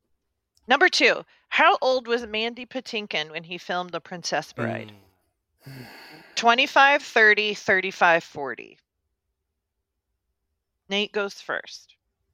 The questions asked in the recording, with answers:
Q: Number two, how old was Mandy Patinkin when he filmed The Princess Bride?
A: The answer's 35.